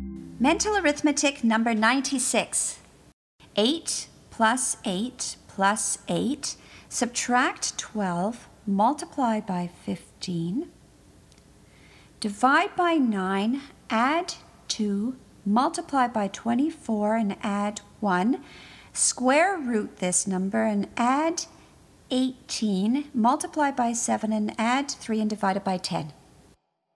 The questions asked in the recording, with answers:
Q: 8 plus 8 plus 8, subtract 12, multiply by 15, divide by 9, add 2, multiply by 24 and add 1, square root this number and add 18, multiply by 7 and add 3 and divide it by 10.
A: And the answer is 29.